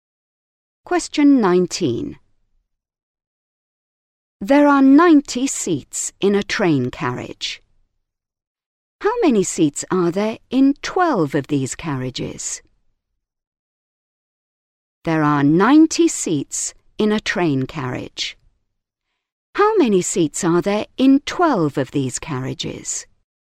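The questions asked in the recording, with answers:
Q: How many seats are there in 12 of these carriages?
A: 1080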